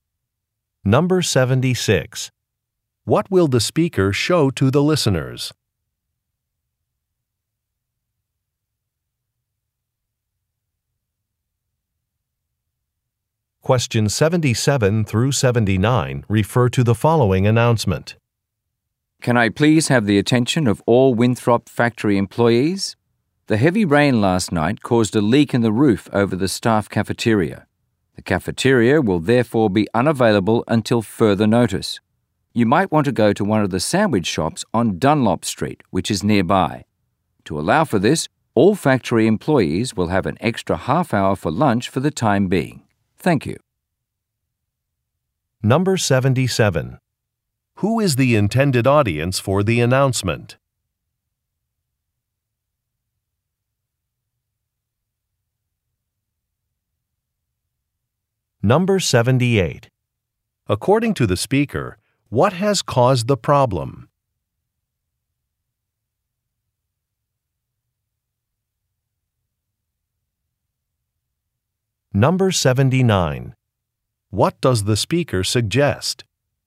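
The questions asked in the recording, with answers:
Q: Who is the intended audience for the announcement?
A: Factory employees

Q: According to the speaker, what has caused the problem?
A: Heavy rain

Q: What does the speaker suggest?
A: Going to sandwich shops on Dunlop Street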